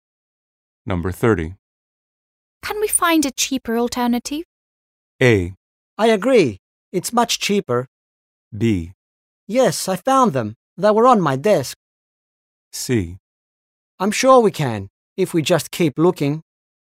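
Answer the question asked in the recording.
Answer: C: I'm sure we can, if we just keep looking.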